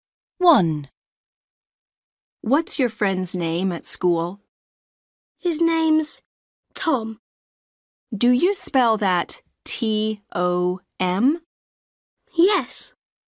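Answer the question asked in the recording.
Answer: Tom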